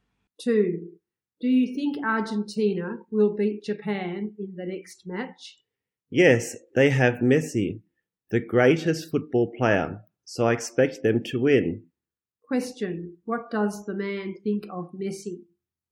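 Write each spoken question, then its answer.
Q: what does the man think of Messi?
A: He is the greatest football player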